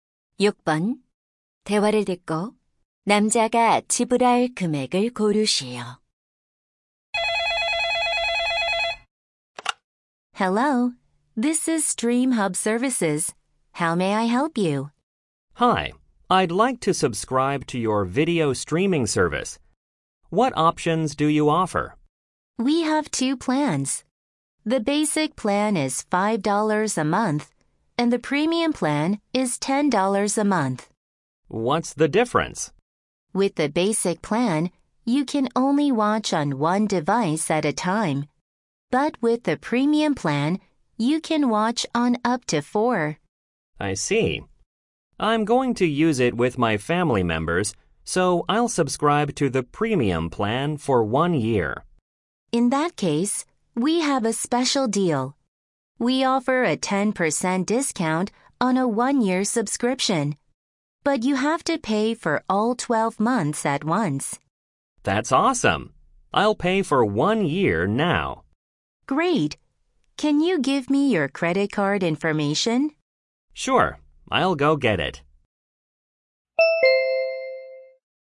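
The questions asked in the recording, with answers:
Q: 대화를 듣고 남자가 지불할 금액을 고르시오.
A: 108달러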